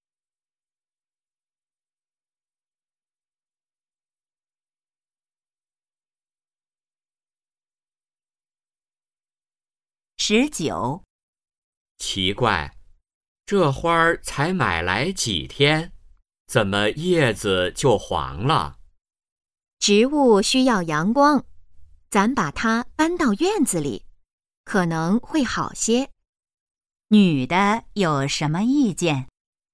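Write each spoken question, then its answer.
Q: 女的有什么意见?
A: 把花搬到院子里晒太阳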